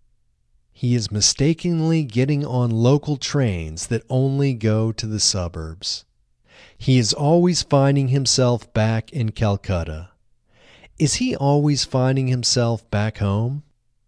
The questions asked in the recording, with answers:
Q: Is he always finding himself back home?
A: No, he isn't always finding himself back home.